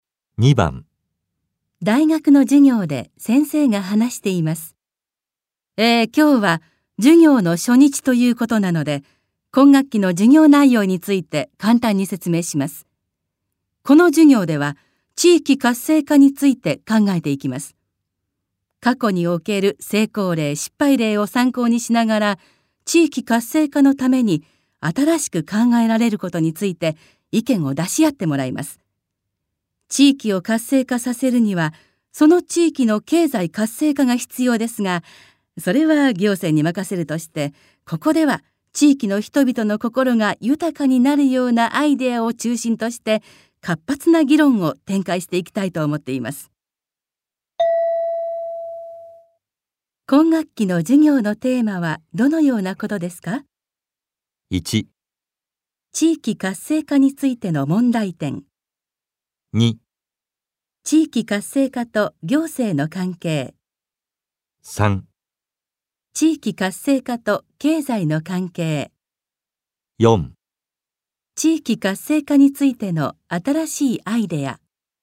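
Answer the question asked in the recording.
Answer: 4: 地域活性化についての新しいアイデア。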